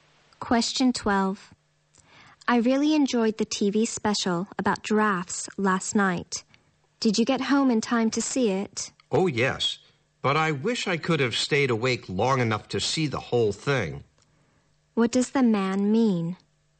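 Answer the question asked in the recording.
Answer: He fell asleep before the TV special ended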